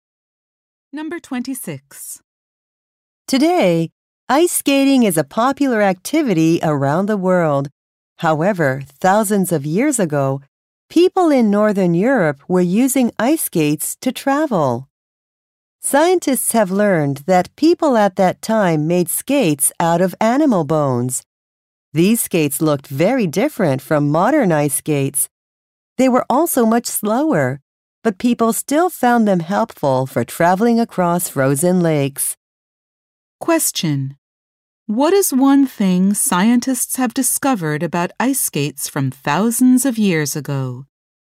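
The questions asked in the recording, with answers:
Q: What is one thing scientists have discovered about ice skates from thousands of years ago?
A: They were made from animal bones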